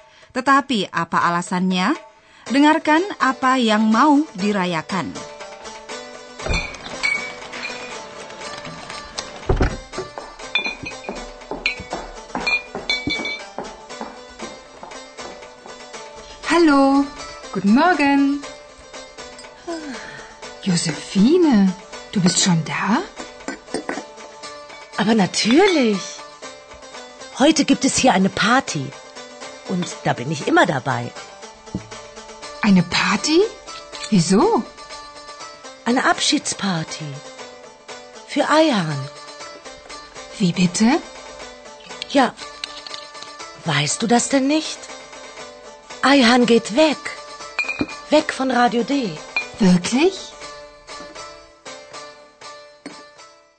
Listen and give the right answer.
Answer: Pasti Anda dapat menangkap bahwa pesta kecil itu dipersiapkan untuk Aihan.